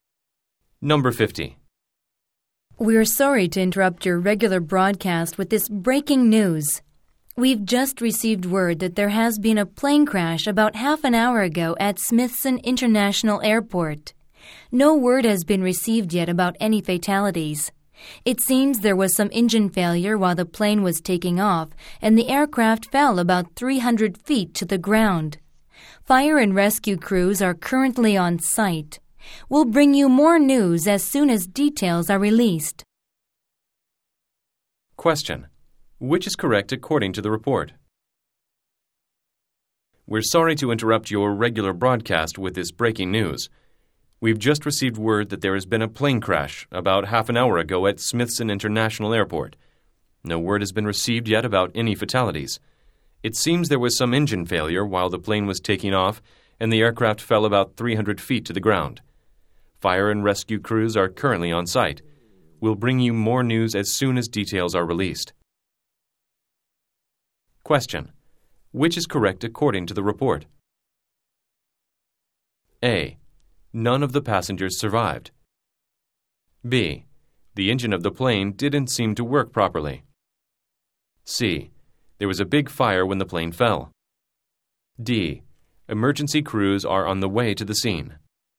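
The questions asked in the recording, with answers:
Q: Which is correct according to the report?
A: B: The engine of the plane didn't seem to work properly.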